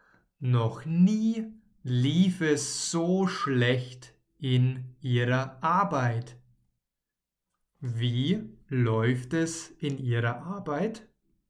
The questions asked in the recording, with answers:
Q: Wie läuft es in Ihrer Arbeit?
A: Schlecht. Es läuft schlecht.